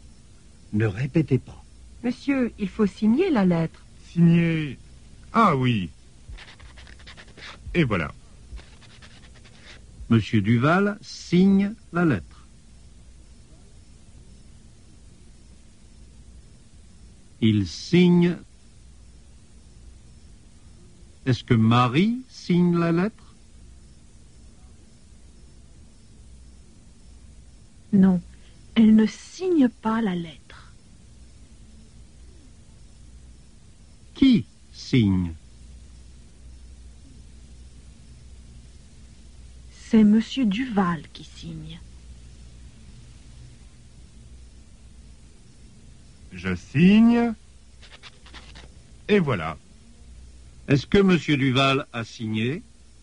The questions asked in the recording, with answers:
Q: Est-ce que Marie signe la lettre?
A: Non, elle ne signe pas la lettre.

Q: Qui signe?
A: C'est Monsieur Duval qui signe.

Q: Est-ce que Monsieur Duval a signé?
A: Oui, il a signé.